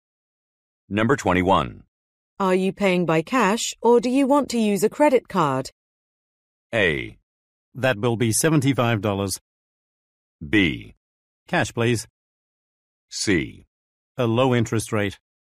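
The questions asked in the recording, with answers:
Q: Are you paying by cash or do you want to use a credit card?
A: B: Cash, please.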